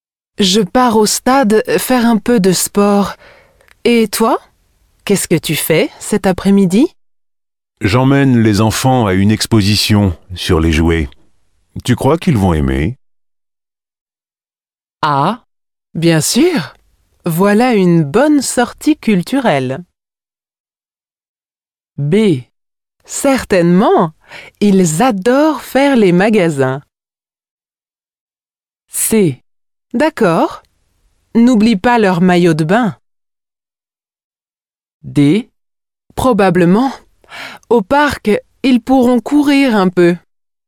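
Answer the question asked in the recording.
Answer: A: Ah, bien sûr! Voilà une bonne sortie culturelle.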